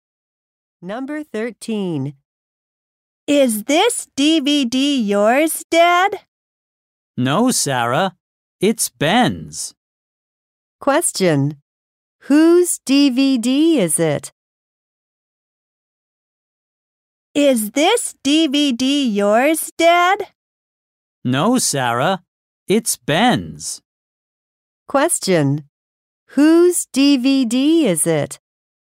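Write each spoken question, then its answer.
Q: Whose DVD is it?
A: Ben's.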